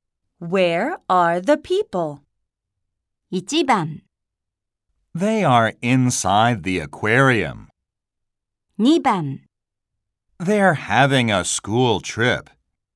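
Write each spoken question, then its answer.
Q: Where are the people?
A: 1: They are inside the aquarium.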